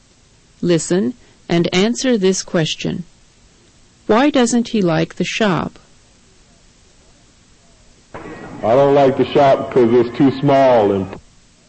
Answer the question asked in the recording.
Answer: The answer is C. It's too small.